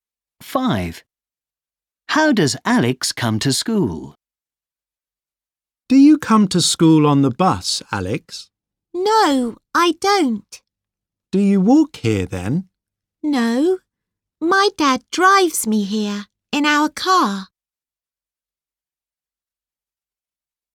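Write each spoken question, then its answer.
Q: How does Alex come to school?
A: his dad drives him in their car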